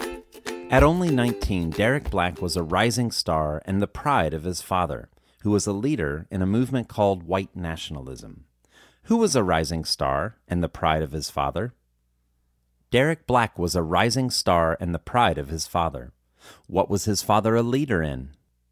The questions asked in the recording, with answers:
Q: Who was a rising star and the pride of his father?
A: Derek Black was a rising star and the pride of his father.

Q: What was his father a leader in?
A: His father was a leader in a racist movement called white nationalism.